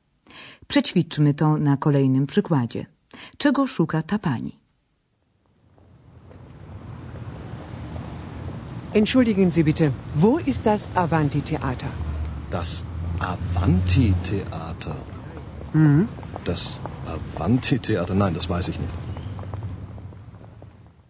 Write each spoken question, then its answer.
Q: Czego szuka ta pani?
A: Osoba ta szuka oczywiście teatru o nazwie Avanti Teata.